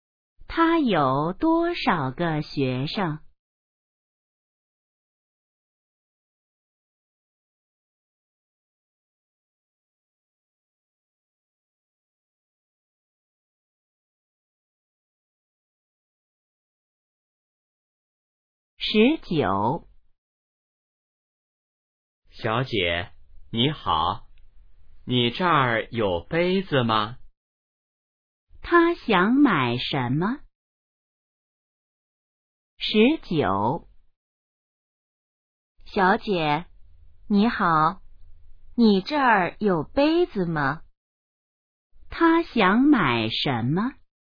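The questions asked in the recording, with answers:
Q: 他想买什么?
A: 杯子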